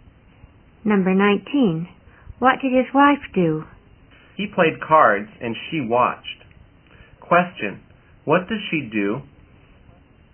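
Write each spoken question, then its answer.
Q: What does she do?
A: She watched him play cards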